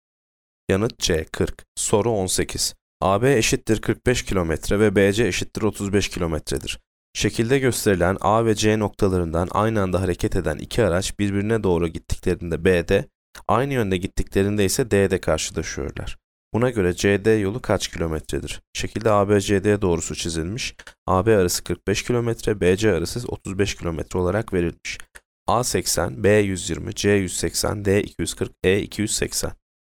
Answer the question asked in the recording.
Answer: Yanıt E 280.